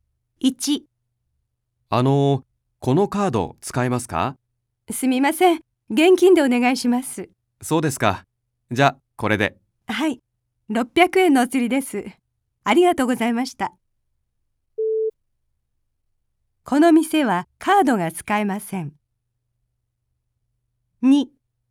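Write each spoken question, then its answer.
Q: この店はカードが使えません。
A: ○(正しい)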